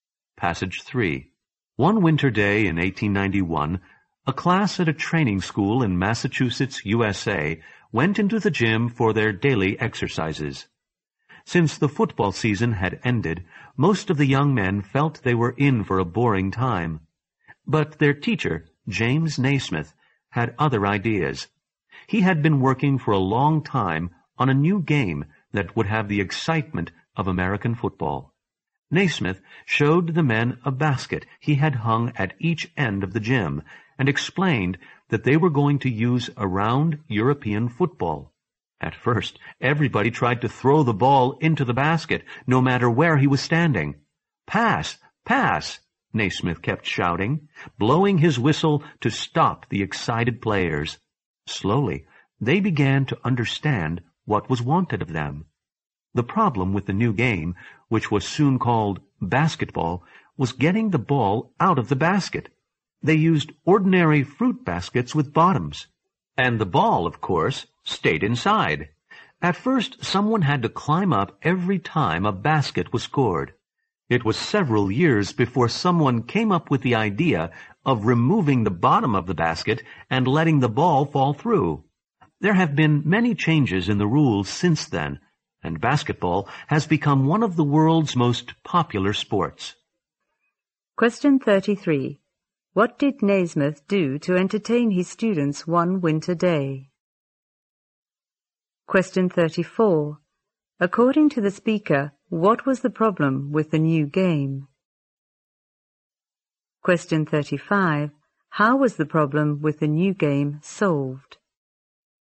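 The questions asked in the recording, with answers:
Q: What did Naismith do to entertain his students one winter day?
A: He introduced a new game, basketball.

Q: According to the speaker, what was the problem with the new game?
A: Getting the ball out of the basket.

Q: How was the problem with the new game solved?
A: By removing the bottom of the basket.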